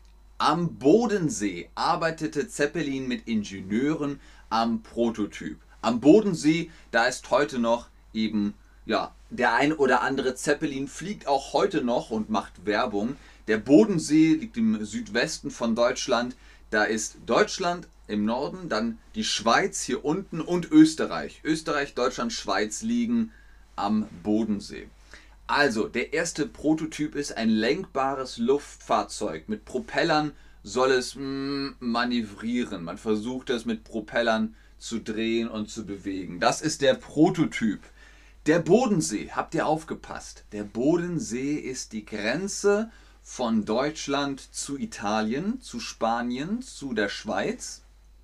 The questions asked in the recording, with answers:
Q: Der Bodensee ist die Grenze von Deutschland zu Italien, zu Spanien, zu der Schweiz.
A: Richtig, es ist die Grenze von von Deutschland und der Schweiz und Österreich.